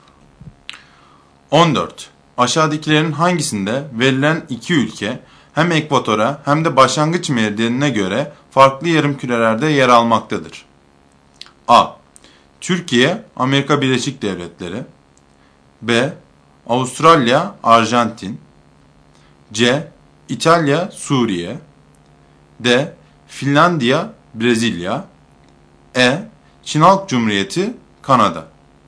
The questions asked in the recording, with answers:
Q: Aşağıdakilerin hangisinde verilen iki ülke hem ekvatora hem de başlangıç meridyenine göre farklı yarımkürelerde yer almaktadır?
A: Doğru seçenek D şıkkı.